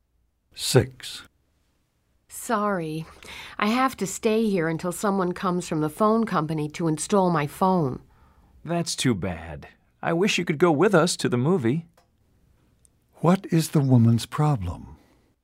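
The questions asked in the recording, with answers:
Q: What is the woman's problem?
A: She must stay home waiting for the phone company, so she can't go to the movie.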